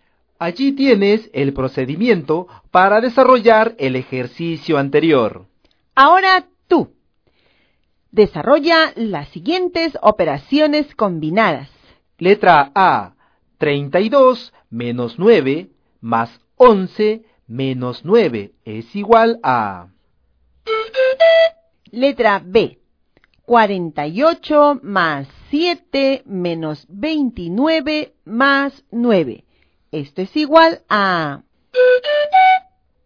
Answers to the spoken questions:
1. te salió 25
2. el resultado que obtuviste es 35